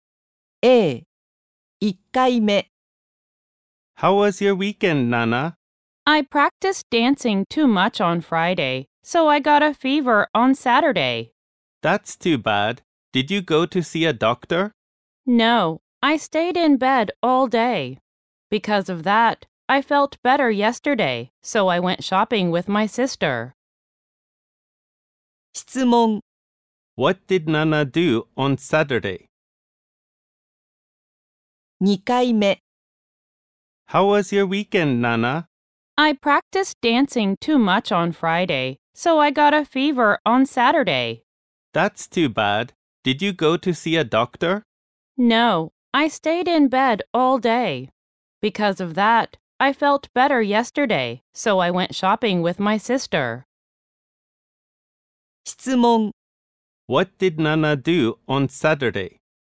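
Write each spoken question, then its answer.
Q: What did Nana do on Saturday?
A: She stayed in bed all day.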